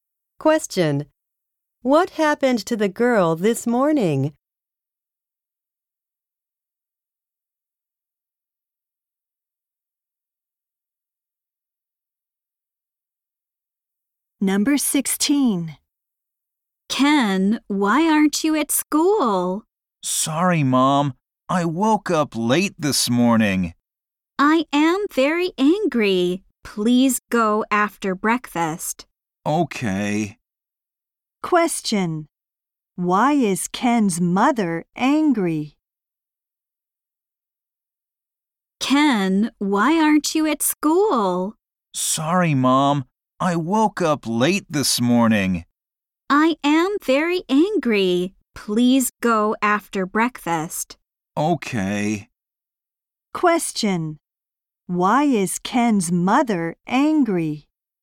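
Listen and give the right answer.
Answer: Because Ken woke up late and isn't at school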